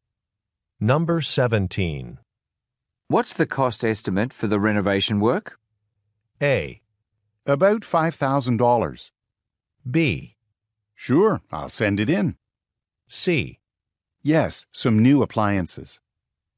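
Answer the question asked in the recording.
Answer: A: About $5,000.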